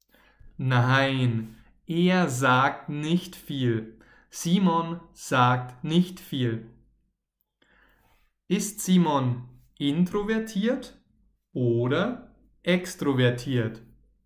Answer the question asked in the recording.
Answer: introvertiert. Simon ist introvertiert.